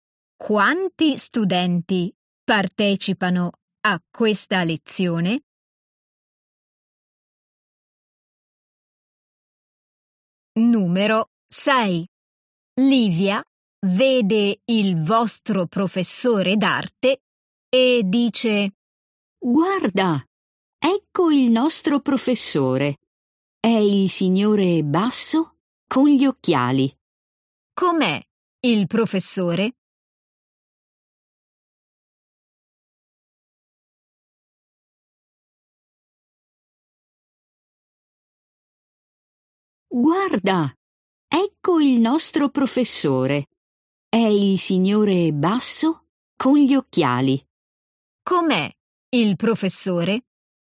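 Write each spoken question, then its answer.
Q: Com'è il professore?»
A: Basso con gli occhiali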